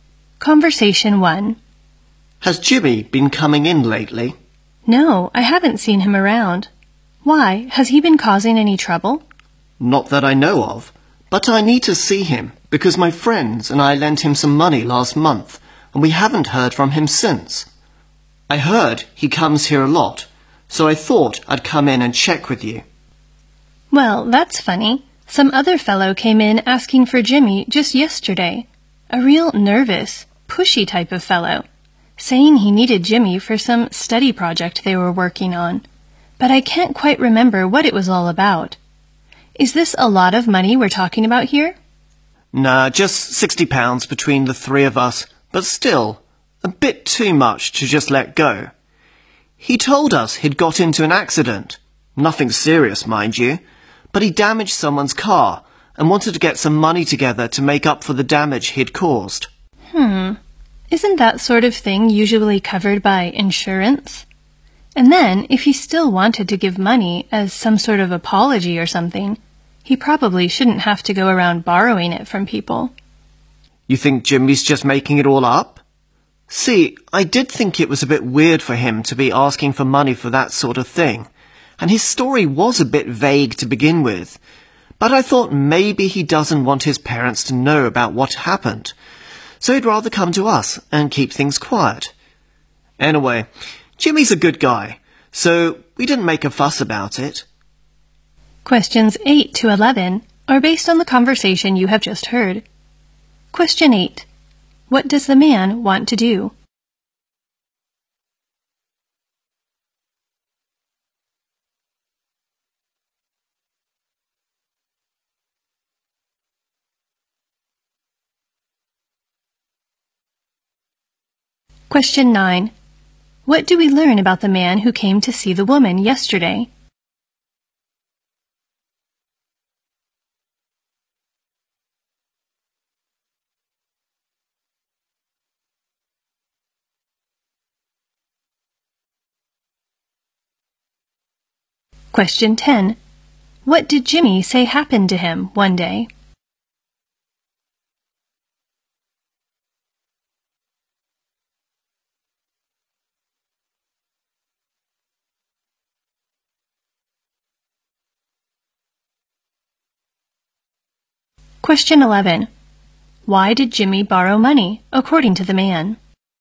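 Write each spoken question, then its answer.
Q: What does the man want to do?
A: Find Jimmy to get back the money lent to him

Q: What do we learn about the man who came to see the woman yesterday?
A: He was nervous and pushy, looking for Jimmy for a study project

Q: What did Jimmy say happened to him one day?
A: He had an accident and damaged someone's car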